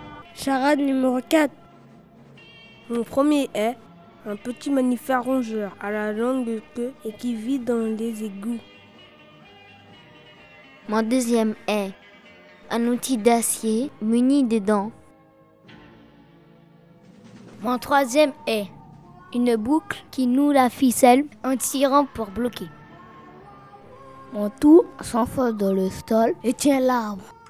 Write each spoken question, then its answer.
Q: Mon tout s'enfonce dans le sol et tient l'arbre.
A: la racine.